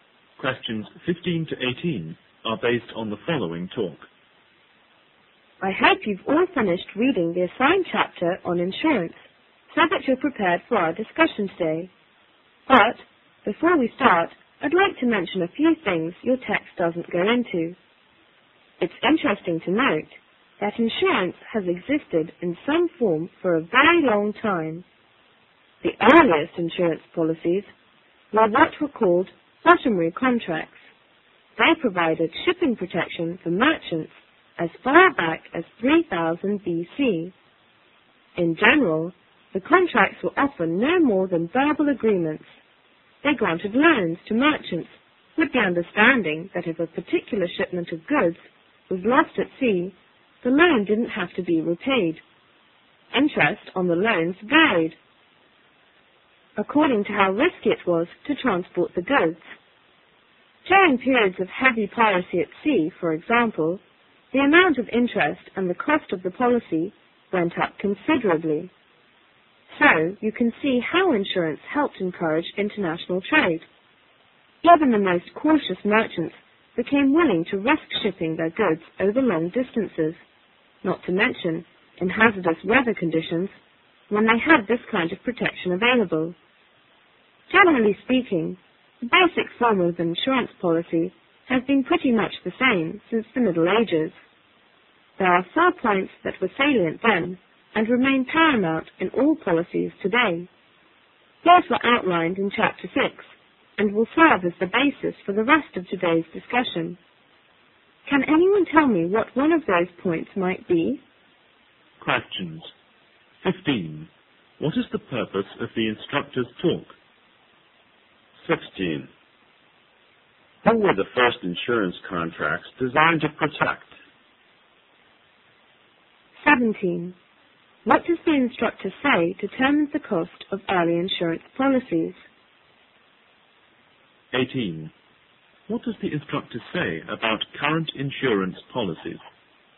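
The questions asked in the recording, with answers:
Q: Who were the first insurance contracts designed to protect?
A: Merchants shipping goods

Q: What does the instructor say determines the cost of early insurance policies?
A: How risky it was to transport the goods

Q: What does the instructor say about current insurance policies?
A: Their basic form is much the same as in the Middle Ages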